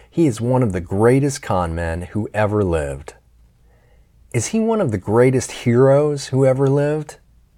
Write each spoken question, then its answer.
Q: Is he one of the greatest heroes who ever lived?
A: No, he isn't one of the greatest heroes who ever lived.